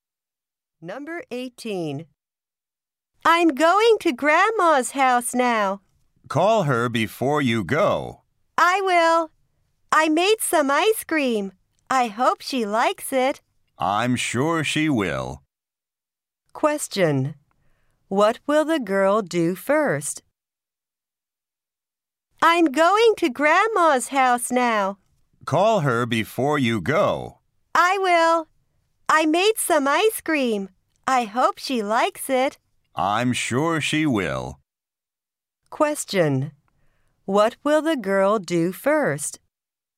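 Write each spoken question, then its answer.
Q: What will the girl do first?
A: Call her grandmother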